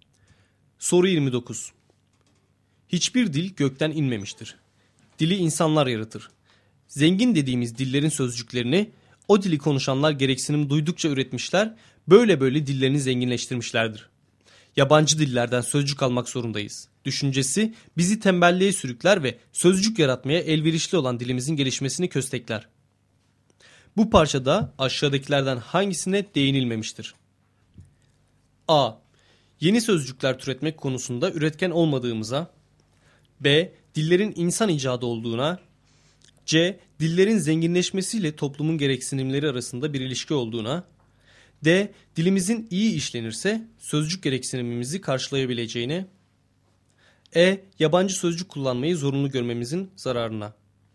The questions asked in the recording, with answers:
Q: Bu parçada aşağıdakilerden hangisine değinilmemiştir?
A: Doğru cevap A şıkkı.